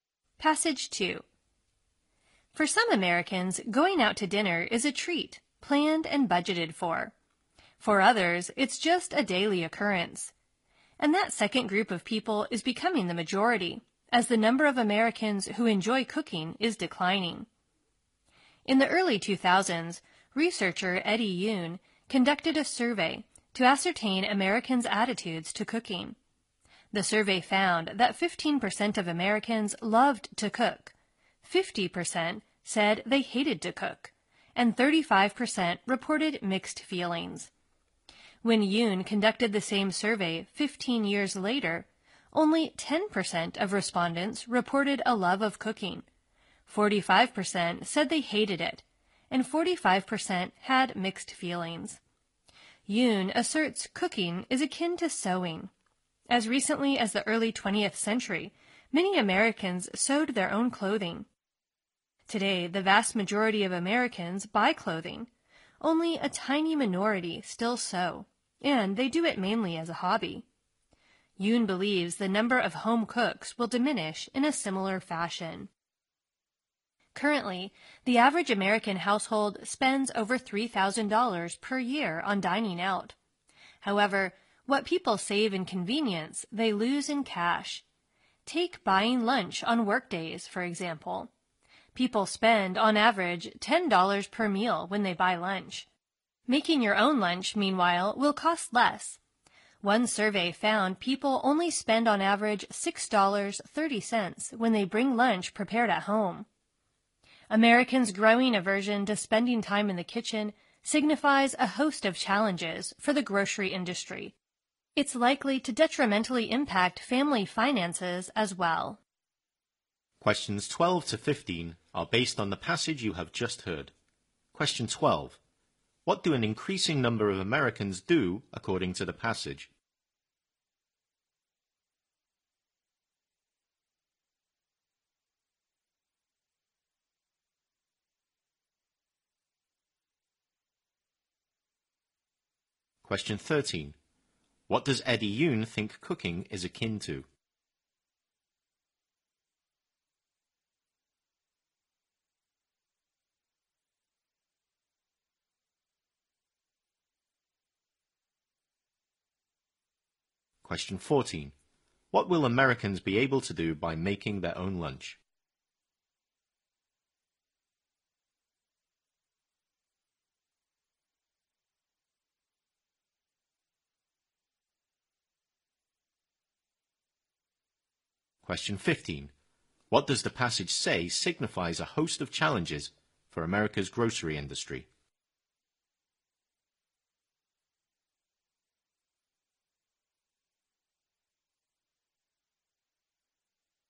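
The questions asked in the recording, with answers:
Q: What does Eddie Yoon think cooking is akin to?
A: Sewing

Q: What will Americans be able to do by making their own lunch?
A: Save money

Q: What does the passage say signifies a host of challenges for America's grocery industry?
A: Americans' growing aversion to spending time in the kitchen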